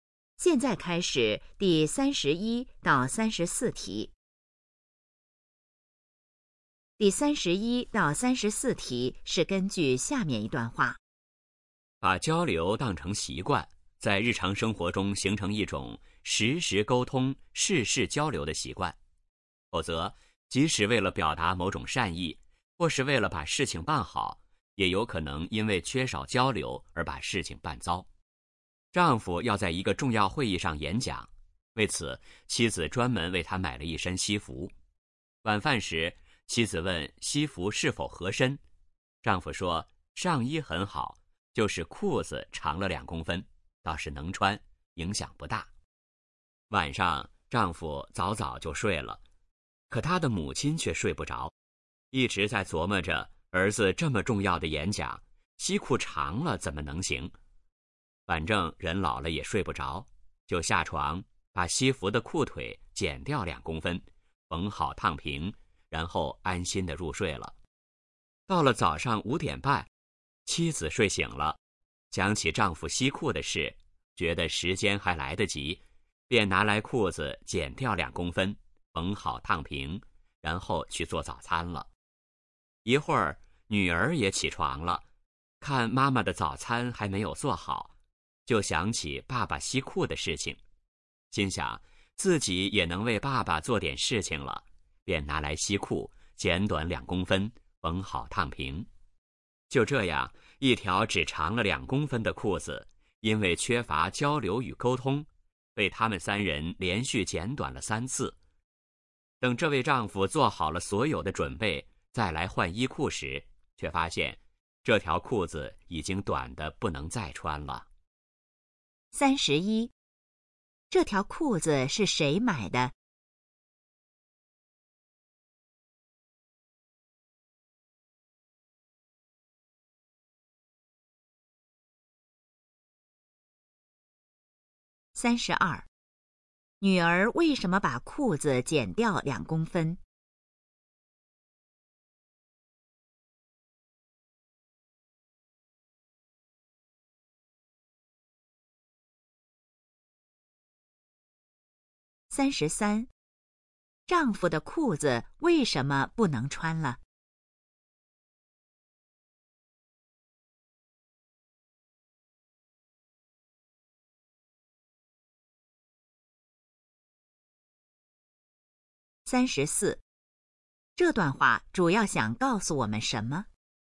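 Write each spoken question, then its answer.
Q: 这条裤子是谁买的?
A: 妻子

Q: 女儿为什么把裤子剪掉2公分?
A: 想为爸爸做点事情

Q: 丈夫的裤子为什么不能穿了?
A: 被连续剪短了3次,太短了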